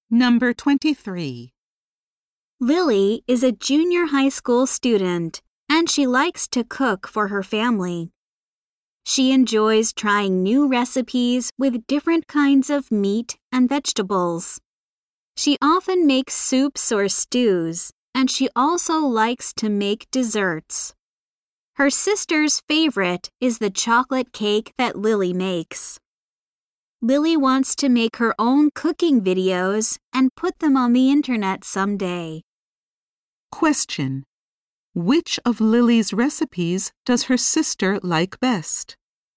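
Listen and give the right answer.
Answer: The chocolate cake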